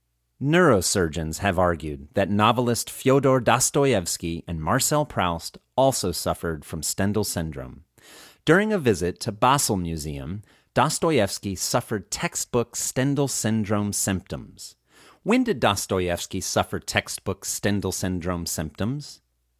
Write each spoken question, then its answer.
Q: When did Dostoevsky suffer textbook Stendhal syndrome symptoms?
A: Dostoevsky suffered textbook Stendhal syndrome symptoms during a visit to Basel Museum.